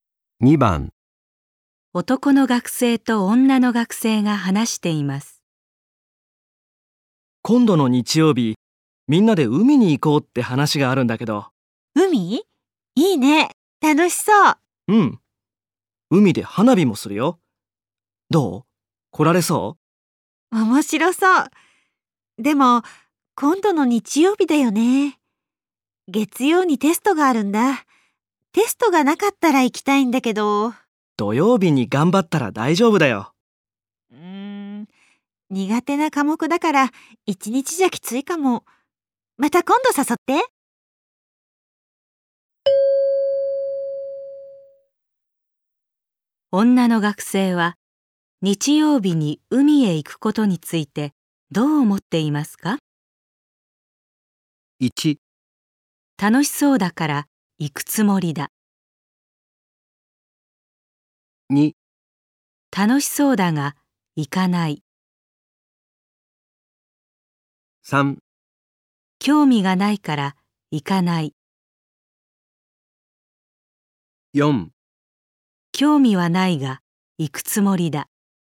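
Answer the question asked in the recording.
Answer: 2: 楽しそうだが行かない。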